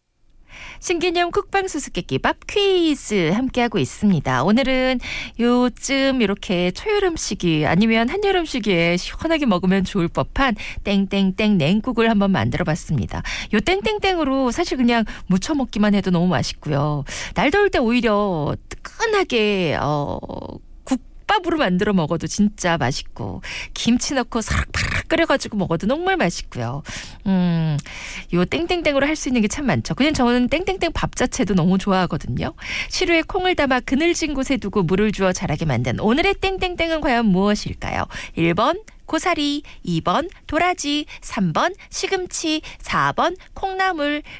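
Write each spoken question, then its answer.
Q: 시루에 콩을 담아 그늘진 곳에 두고 물을 주어 자라게 만든 오늘의 땡땡땡은 과연 무엇일까요?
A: 4: 콩나물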